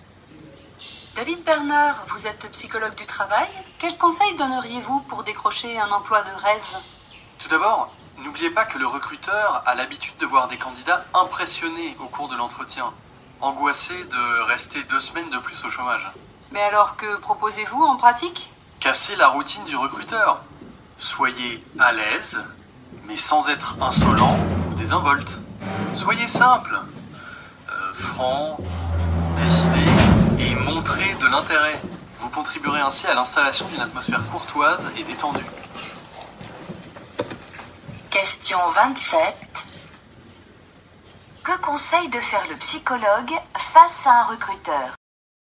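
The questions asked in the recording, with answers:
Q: Que conseille de faire le psychologue face à un recruteur?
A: Casser la routine du recruteur : être à l'aise, simple, franc, décidé et montrer de l'intérêt.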